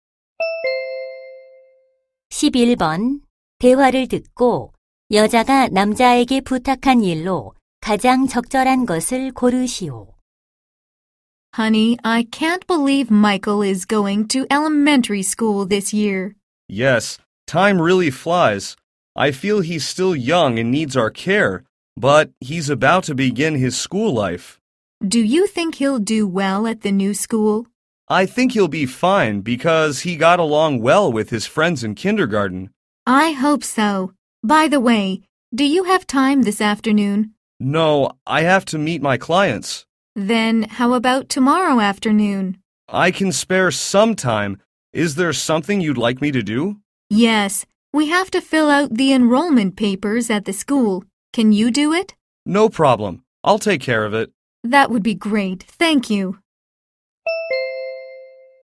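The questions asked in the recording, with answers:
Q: 대화를 듣고 여자가 남자에게 부탁한 일로 가장 적절한 것을 고르시오.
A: 학교 입학 서류 작성하기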